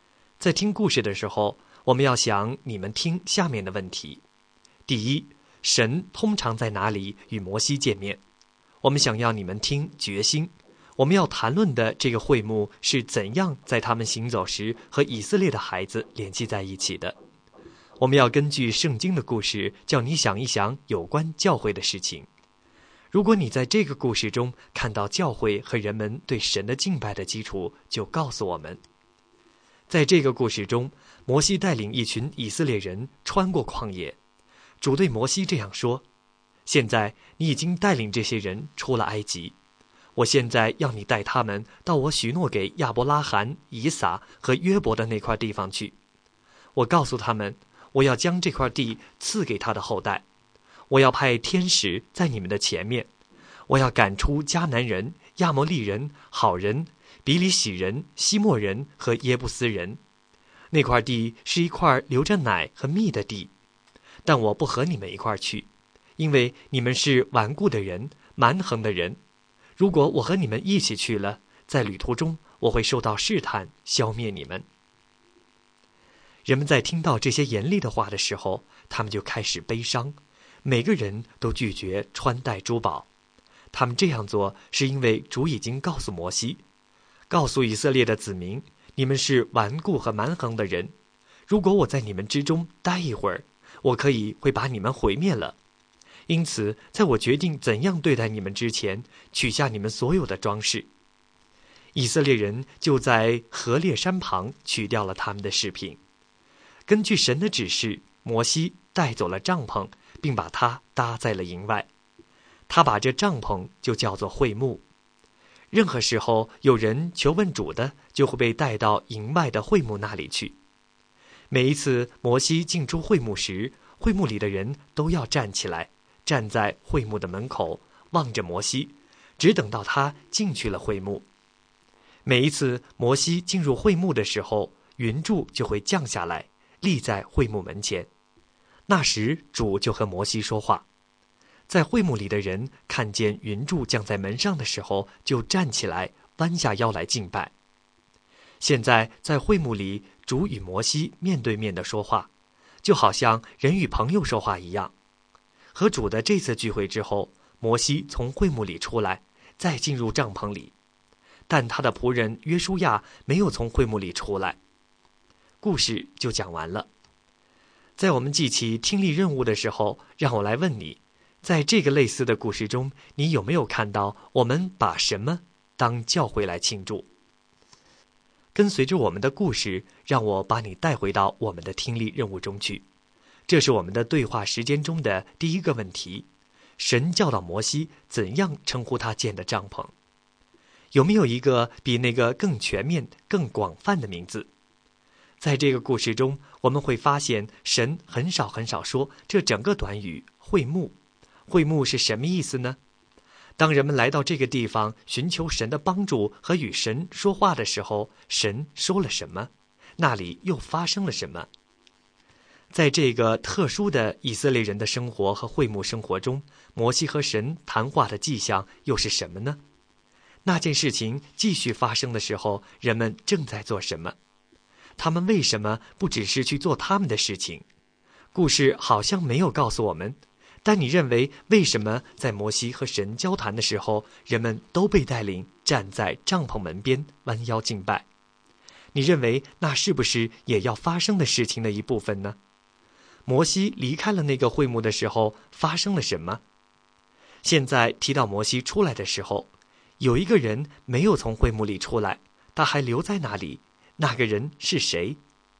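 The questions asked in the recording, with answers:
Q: 神通常在哪里与摩西见面?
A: 在营外的会幕里

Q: 神教导摩西怎样称呼他建的帐篷。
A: 会幕

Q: 摩西和神谈话的迹象又是什么呢?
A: 云柱降下来立在会幕门前

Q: 那件事情继续发生的时候,人们正在做什么?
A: 站起来弯下腰来敬拜

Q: 现在提到摩西出来的时候,有一个人没有从会幕里出来,他还留在那里,那个人是谁?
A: 约书亚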